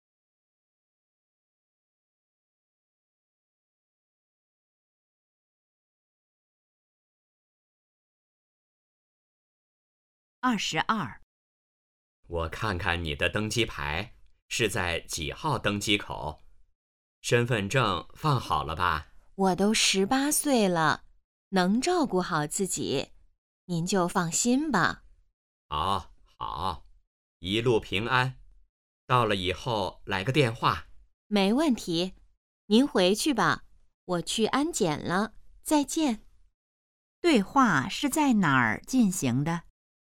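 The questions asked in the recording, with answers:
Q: 对话是在哪儿进行的?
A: 机场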